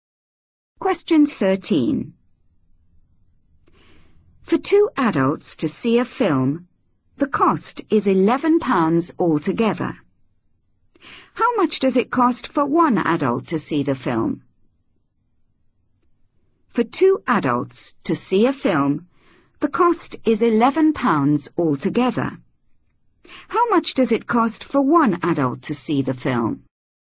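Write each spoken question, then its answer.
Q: How much does it cost for one adult to see the film?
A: £5.50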